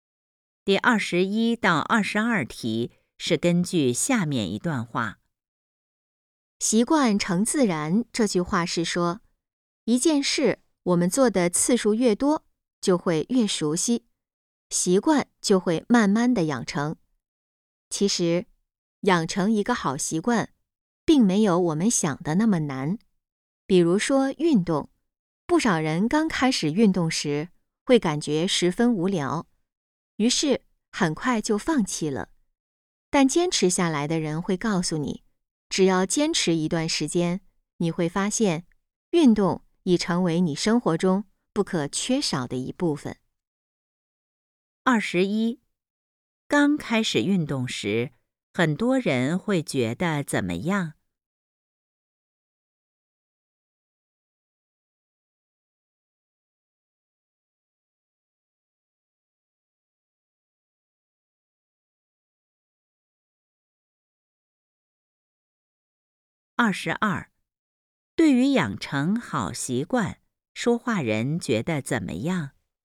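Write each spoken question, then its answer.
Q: 刚开始运动时,很多人会觉得怎么样?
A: 十分无聊

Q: 对于养成好习惯,说话人觉得怎么样?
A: 并没有想的那么难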